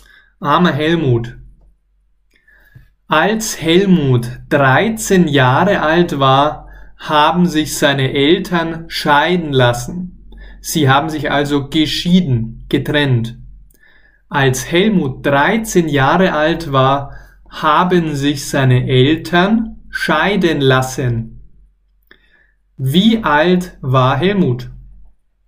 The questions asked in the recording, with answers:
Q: Wie alt war Helmut?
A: 13. Er war 13 Jahre alt.